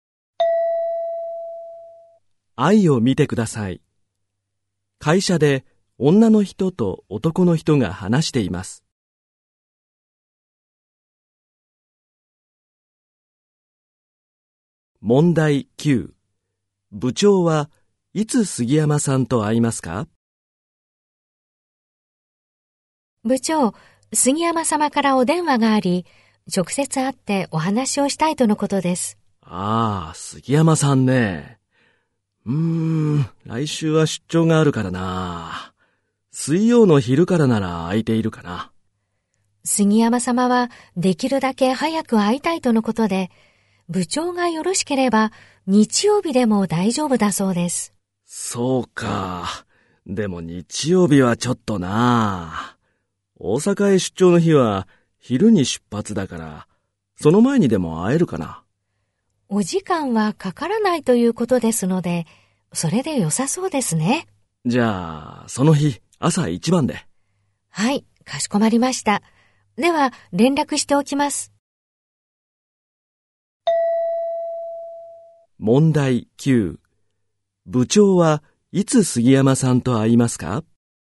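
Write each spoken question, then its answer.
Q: 部長はいつ杉山さんと会いますか?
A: 大阪へ出張する日の朝一番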